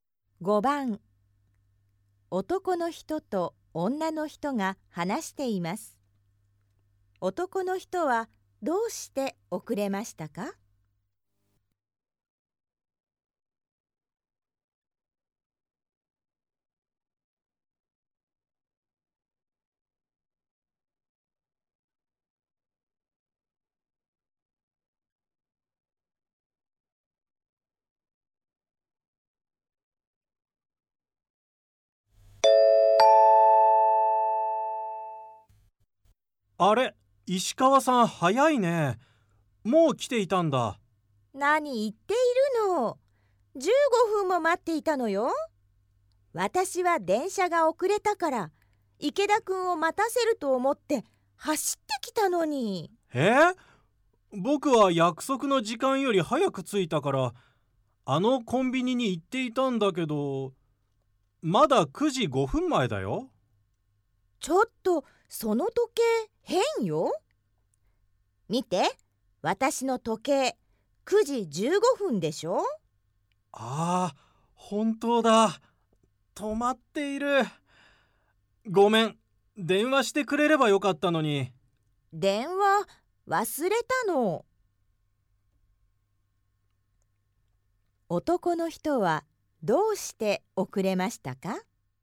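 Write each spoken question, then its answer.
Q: 男の人はどうして遅れましたか?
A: 時計が止まっていたから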